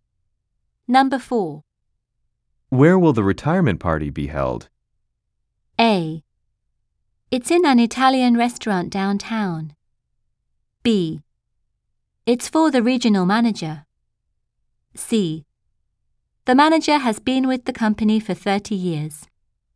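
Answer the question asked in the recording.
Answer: A: It's in an Italian restaurant downtown.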